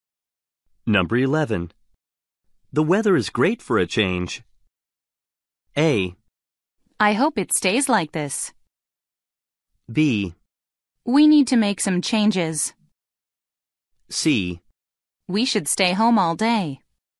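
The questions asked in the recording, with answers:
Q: The weather is great for a change.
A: A: I hope it stays like this.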